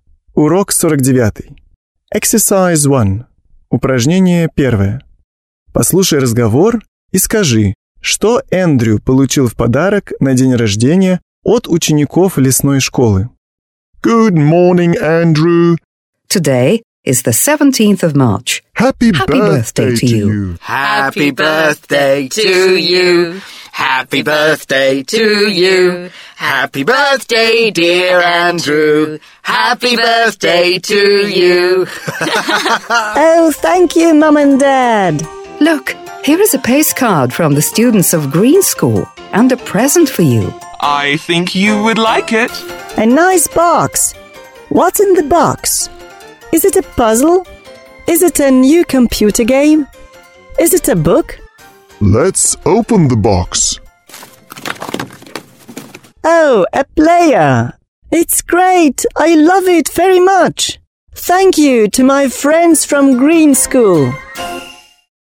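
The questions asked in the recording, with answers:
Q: Послушай разговор и скажи, что Эндрю получил в подарок на день рождения от учеников лесной школы.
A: Плеер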